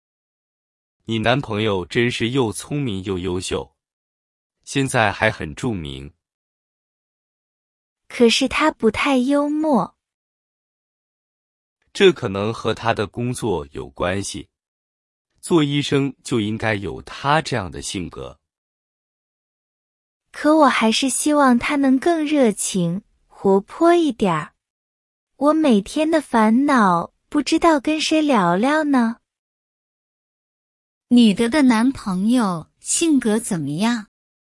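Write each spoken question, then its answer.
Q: 女的男朋友性格怎么样?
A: 不太幽默(不够热情活泼)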